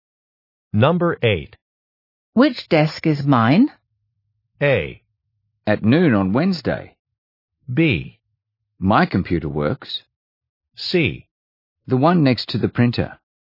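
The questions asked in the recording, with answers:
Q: Which desk is mine?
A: C: The one next to the printer.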